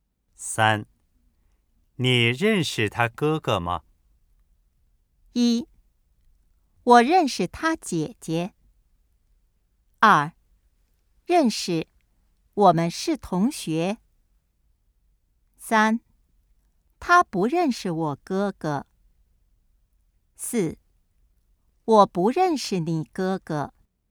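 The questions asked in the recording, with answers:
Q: 你认识他哥哥吗?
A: 二: 认识,我们是同学。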